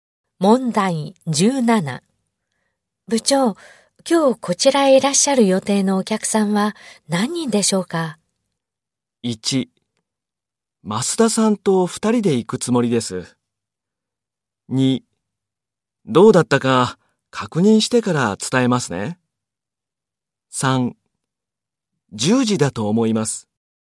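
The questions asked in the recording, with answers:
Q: 部長、今日こちらへいらっしゃる予定のお客さんは何人でしょうか?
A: 3: どうだったか確認してから伝えますね。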